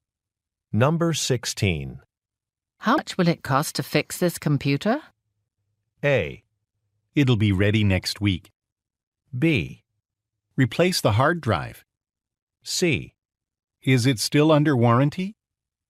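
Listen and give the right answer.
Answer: C: Is it still under warranty?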